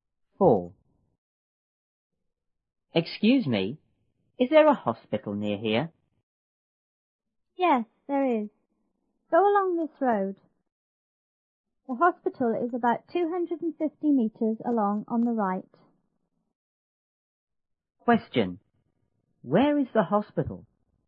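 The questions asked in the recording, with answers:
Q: Where is the hospital?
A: About 250 meters along this road on the right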